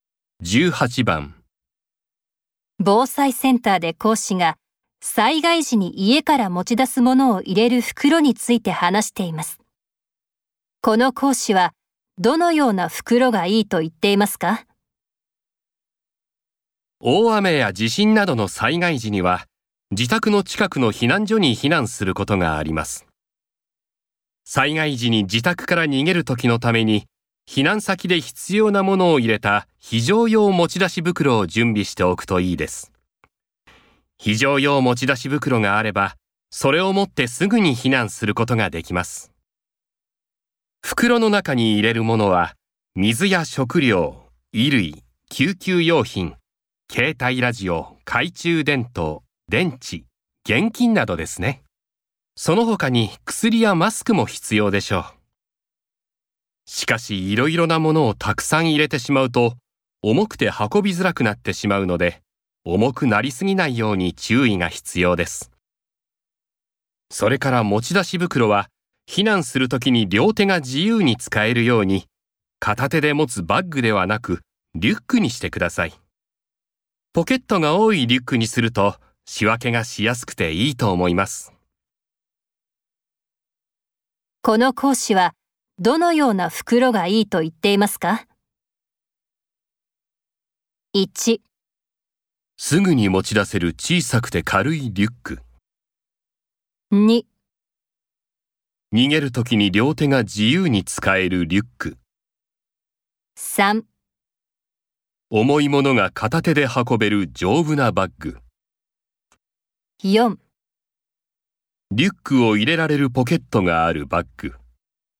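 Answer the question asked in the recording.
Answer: 2: 逃げるときに両手が自由に使えるリュック。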